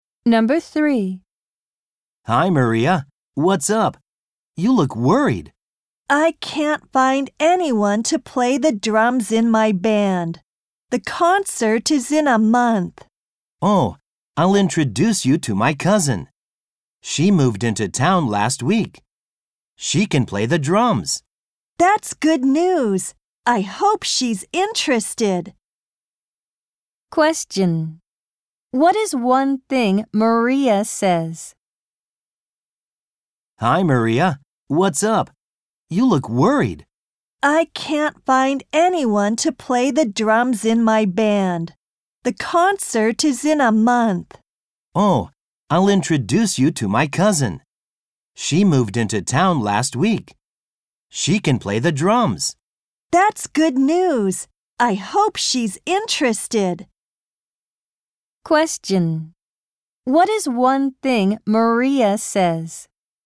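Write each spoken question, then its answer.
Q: What is one thing Maria says?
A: She can't find anyone to play the drums in her band.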